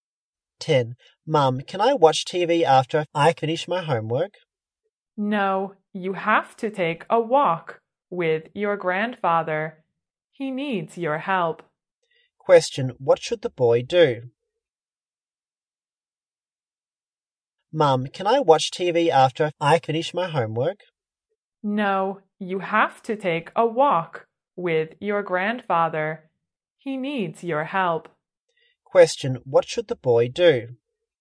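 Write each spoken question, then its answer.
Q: what should the boy do?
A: Take a walk with his grandfather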